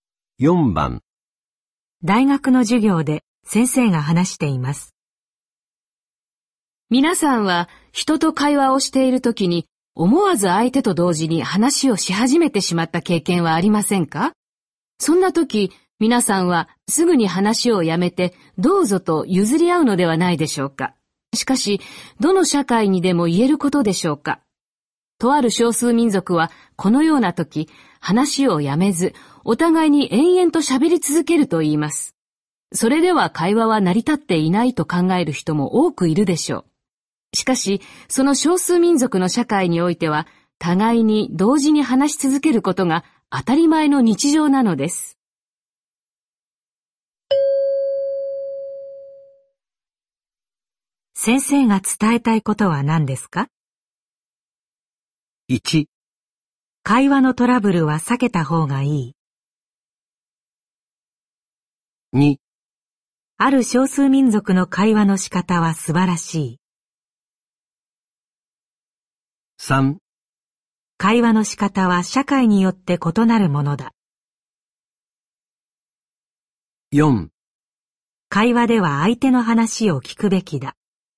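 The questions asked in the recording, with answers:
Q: 先生が伝えたいことは何ですか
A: 3: 会話の仕方は社会によって異なるものだ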